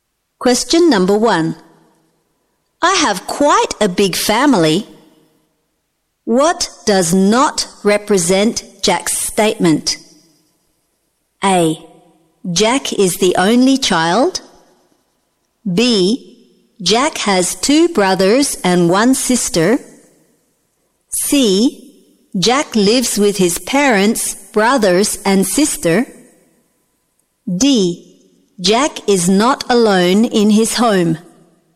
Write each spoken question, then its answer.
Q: What does not represent Jack's statement?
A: A. Jack is the only child.